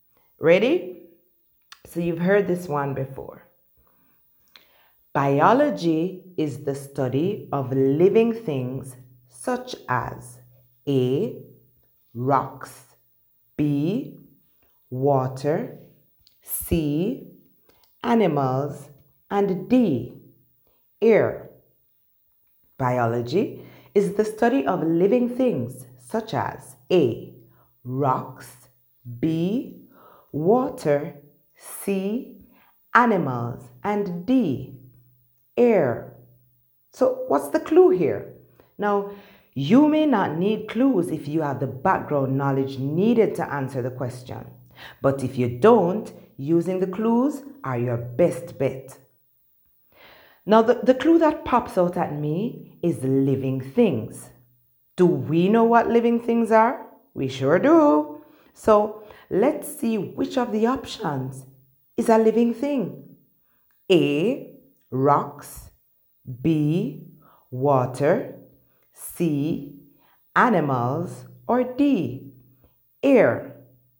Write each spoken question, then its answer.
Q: Biology is the study of living things such as A, rocks, B, water, C, animals, and D, air.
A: the answer is C, animals.